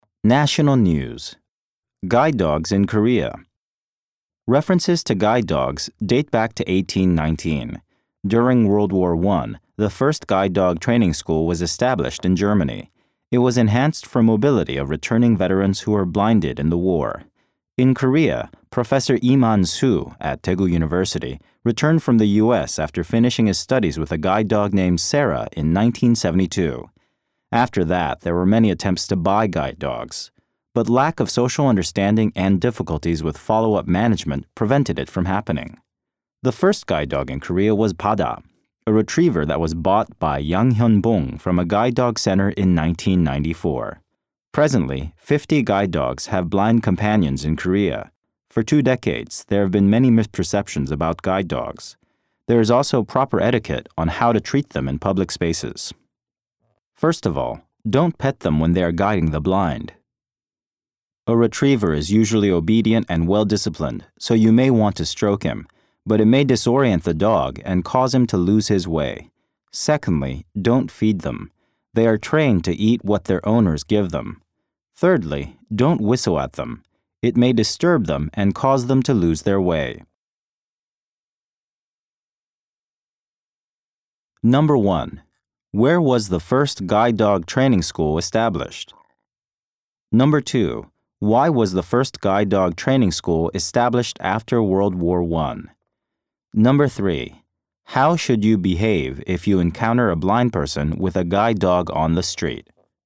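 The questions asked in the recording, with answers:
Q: Where was the first guide dog training school established?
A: In Germany

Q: Why was the first guide dog training school established after World War I?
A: To help the mobility of veterans who were blinded in the war

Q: How should you behave if you encounter a blind person with a guide dog on the street?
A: Don't pet, feed, or whistle at the dog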